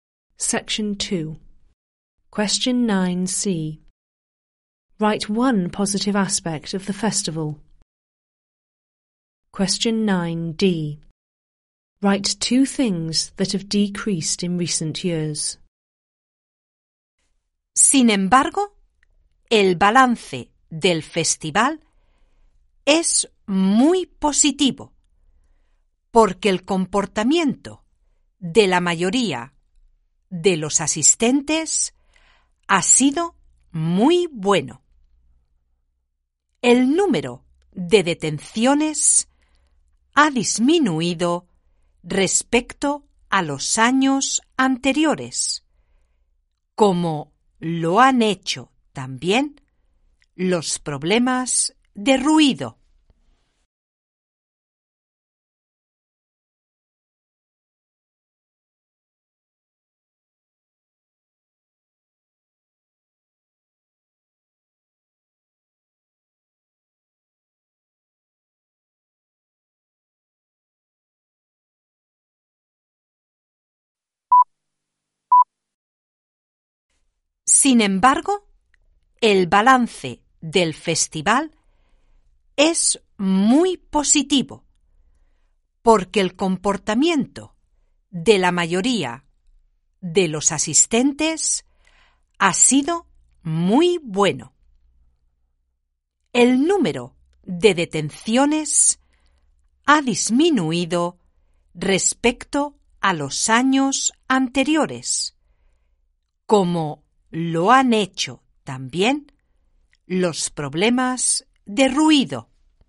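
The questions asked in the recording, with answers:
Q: Write one positive aspect of the festival.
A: Most attendees behaved very well

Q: Write 2 things that have decreased in recent years.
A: Number of arrests and noise problems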